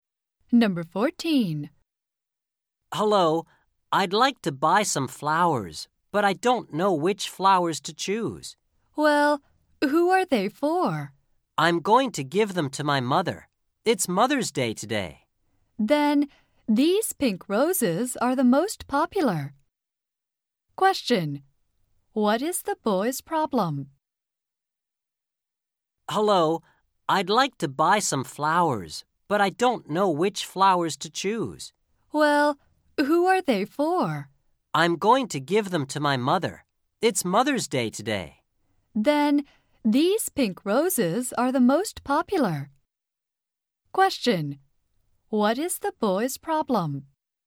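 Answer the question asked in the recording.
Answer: He doesn't know which flowers to choose.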